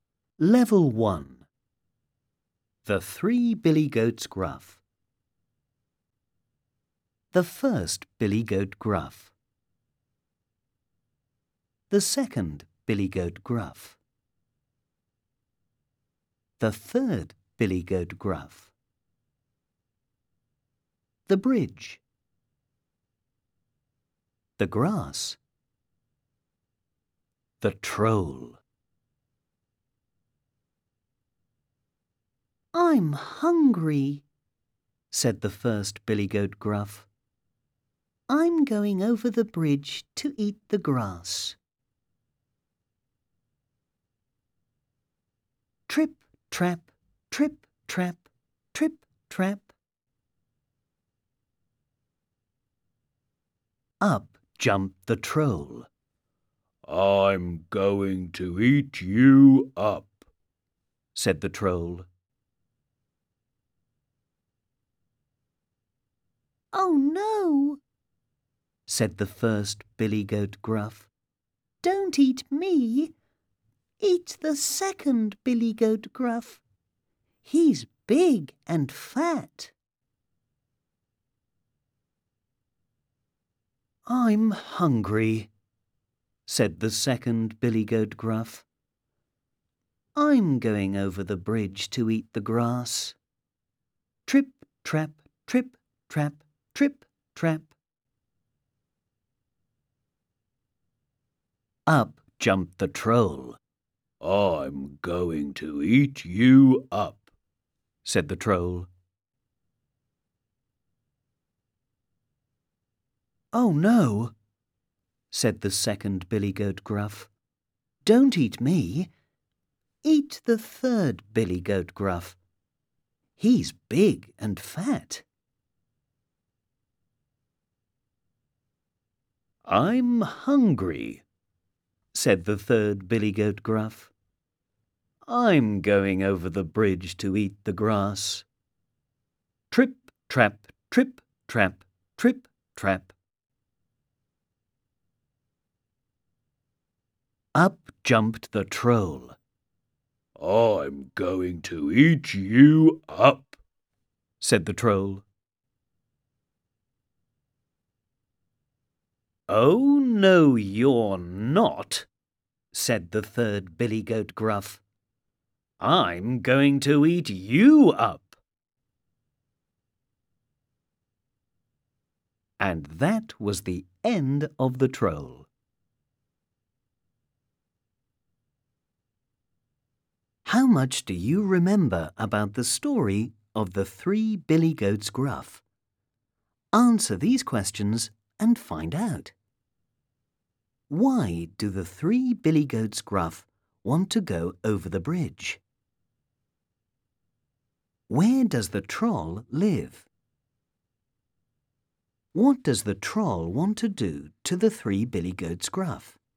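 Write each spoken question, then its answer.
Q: Why do the three Billy Goats Gruff want to go over the bridge?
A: To eat the grass

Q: What does the troll want to do to the three Billy Goats Gruff?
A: Eat them up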